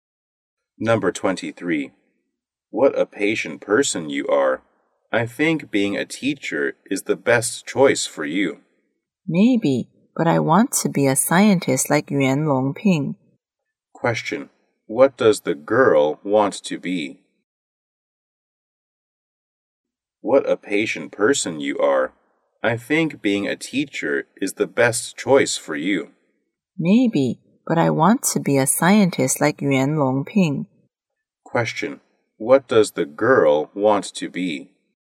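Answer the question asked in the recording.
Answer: A scientist.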